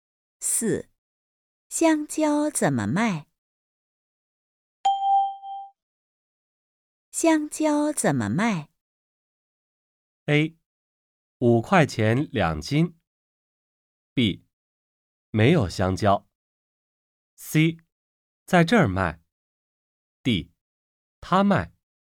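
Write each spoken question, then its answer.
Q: 香蕉怎么卖?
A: A: 五块钱两斤。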